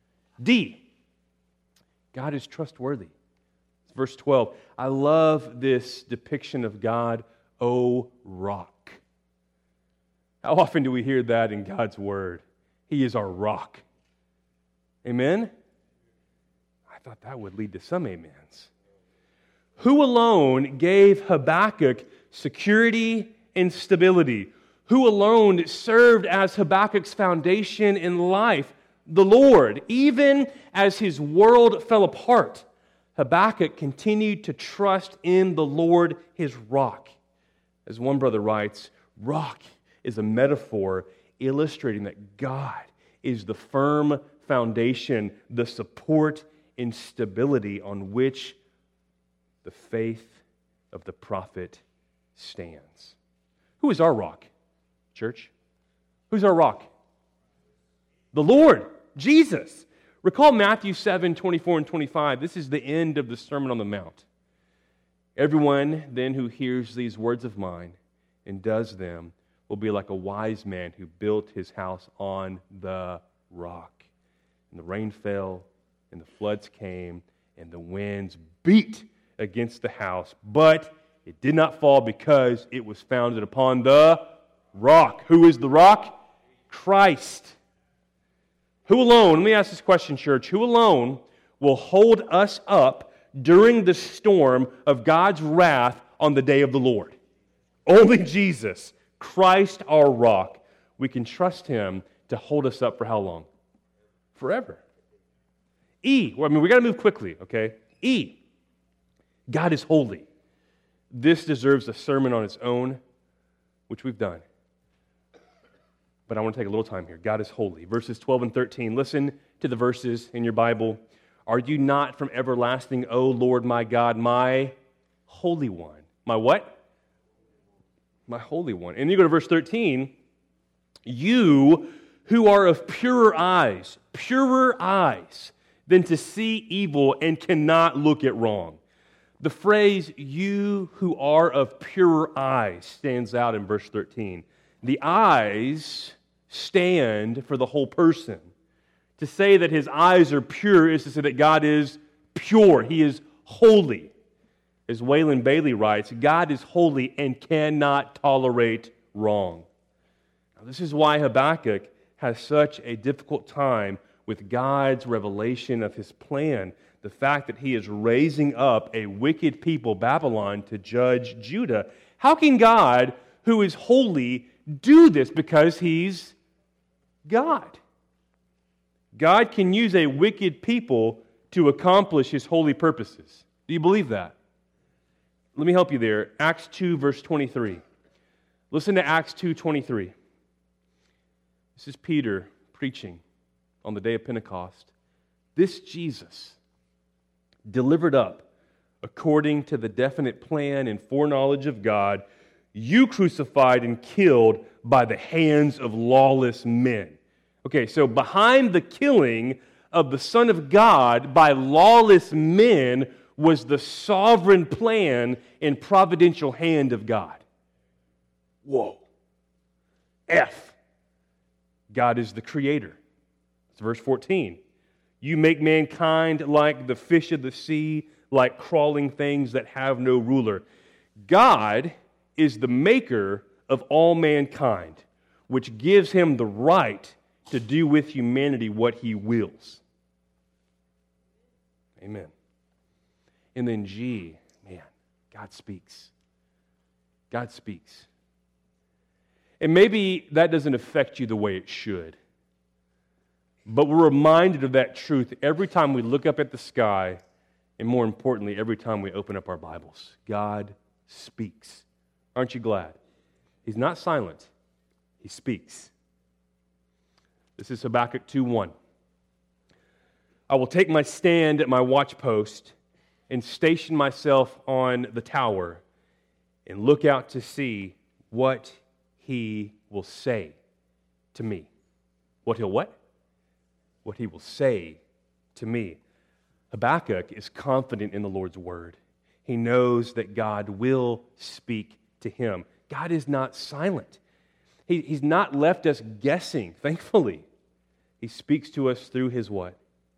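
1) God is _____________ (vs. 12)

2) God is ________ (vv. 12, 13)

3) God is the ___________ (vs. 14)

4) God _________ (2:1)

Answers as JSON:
{"1": "trustworthy", "2": "holy", "3": "creator", "4": "speaks"}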